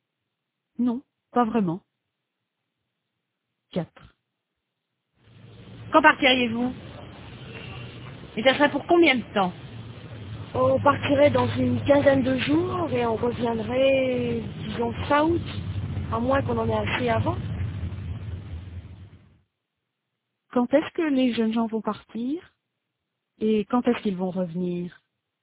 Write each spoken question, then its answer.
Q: Quand est-ce que les jeunes gens vont partir?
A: Ils partiraient dans une quinzaine de jours

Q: Et quand est-ce qu'ils vont revenir?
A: ils reviendraient fin août.